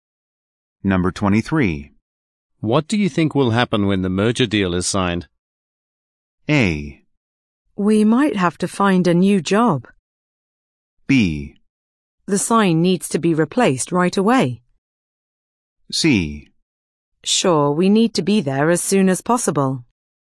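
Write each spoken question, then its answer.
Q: What do you think will happen when the merger deal is signed?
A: A: We might have to find a new job.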